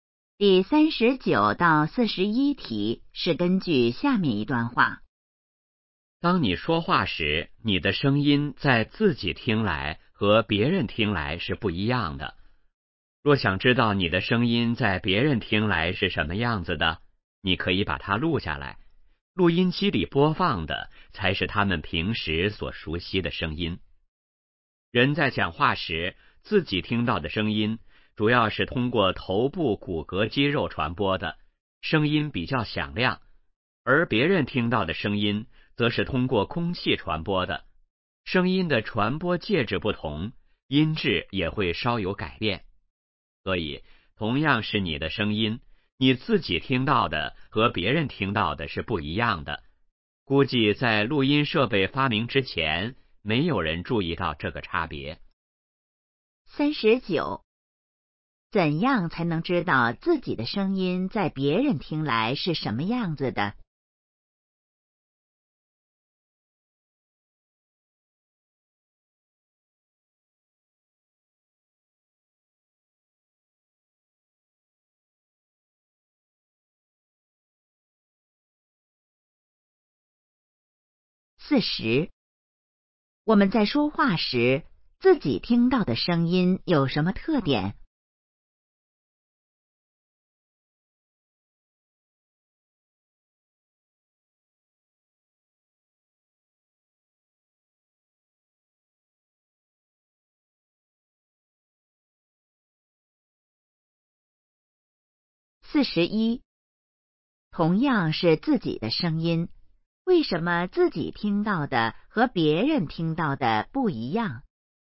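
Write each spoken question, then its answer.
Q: 怎样才能知道自己的声音在别人听来是什么样子的?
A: 把它录下来

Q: 我们在说话时,自己听到的声音有什么特点?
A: 比较响亮

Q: 同样是自己的声音,为什么自己听到的和别人听到的不一样?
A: 声音的传播介质不同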